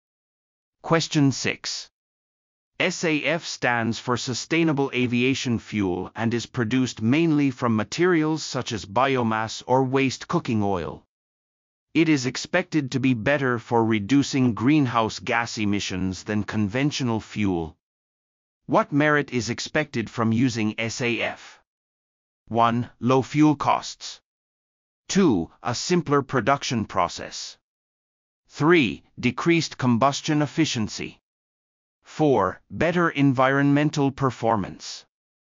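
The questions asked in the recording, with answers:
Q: What merit is expected from using SAF?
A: 4: Better environmental performance.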